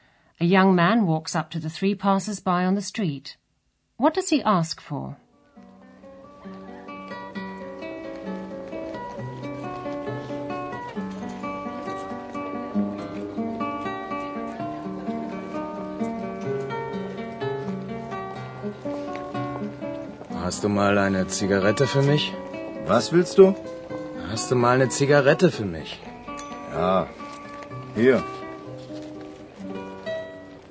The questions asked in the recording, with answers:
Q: What does he ask for?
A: The young man asks them for a cigarette.